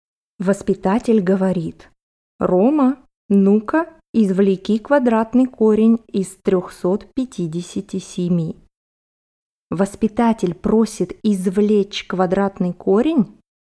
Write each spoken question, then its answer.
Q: Воспитатель просит извлечь квадратный корень?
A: Да, воспитатель просит извлечь квадратный корень.